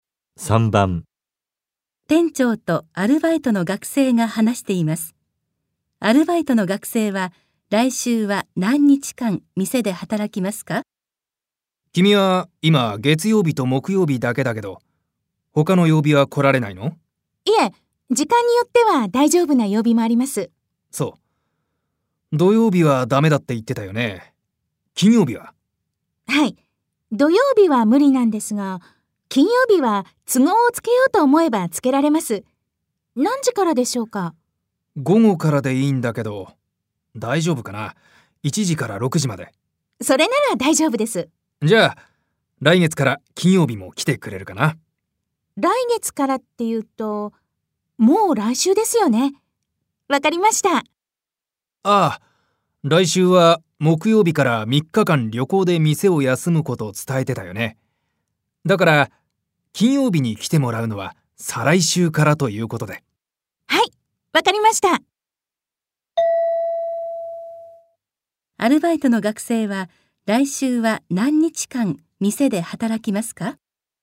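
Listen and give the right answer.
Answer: 1日間(月曜日だけ)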